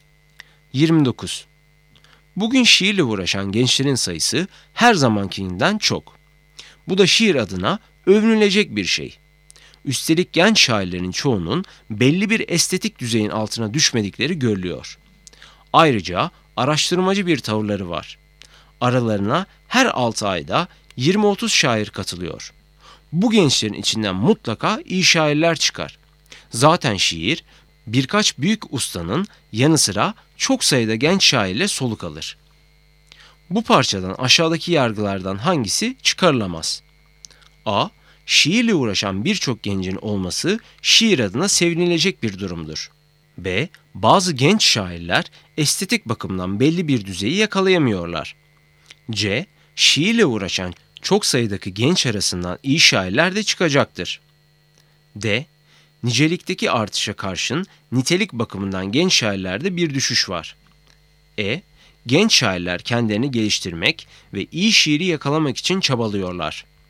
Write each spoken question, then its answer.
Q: Bu parçadan aşağıdaki yargılardan hangisi çıkarılamaz?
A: Doğru cevap D. Nicelikteki artışa karşın nitelik bakımından genç şairlerde bir düşüş var.